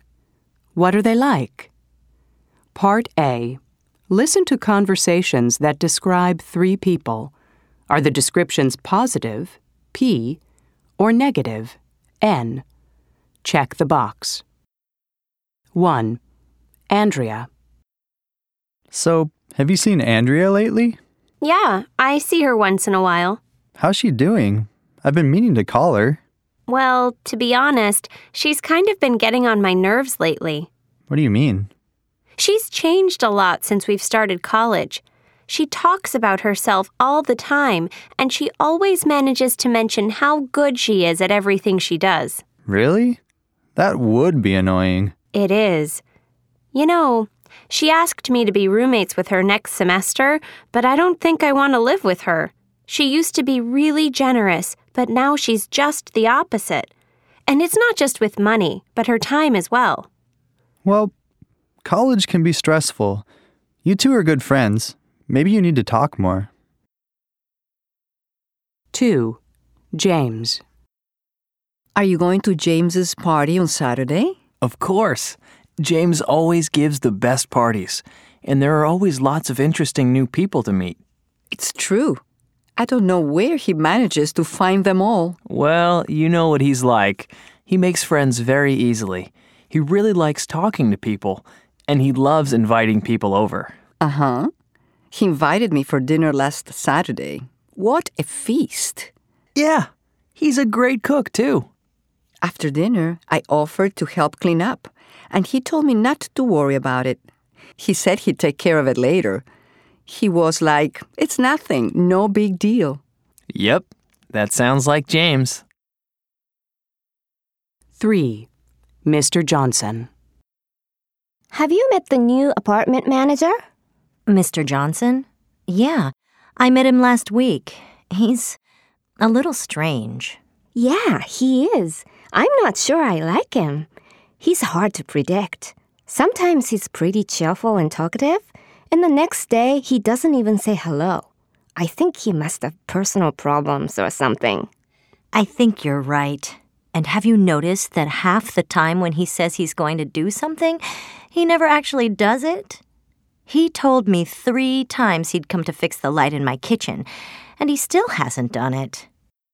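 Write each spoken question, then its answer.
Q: Andrea.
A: N: negative

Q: James.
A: P: positive

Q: Mr. Johnson.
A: N: negative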